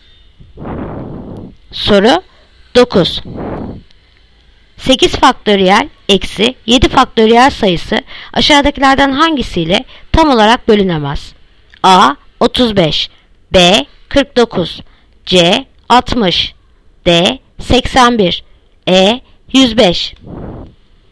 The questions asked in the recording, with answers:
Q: 8 faktöriyel eksi 7 faktöriyel sayısı aşağıdakilerden hangisiyle tam olarak bölünemez?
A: Yanıt Diyarbakır 81.